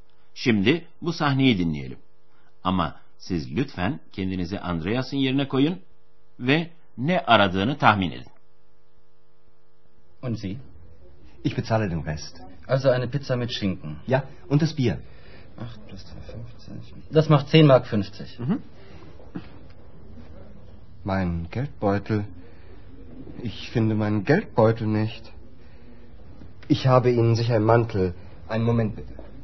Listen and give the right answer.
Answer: Andreas cüzdanını arıyor.